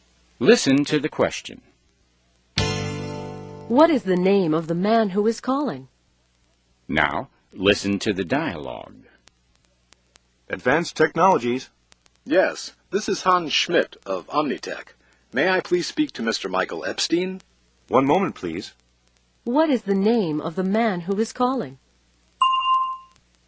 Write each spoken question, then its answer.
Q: What is the name of the man who is calling?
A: His name is Hans Schmidt.